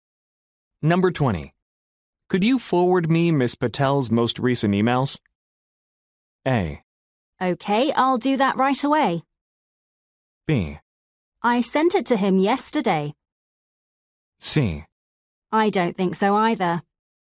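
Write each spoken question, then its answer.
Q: Could you forward me Ms. Patel's most recent emails?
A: A: Okay, I'll do that right away.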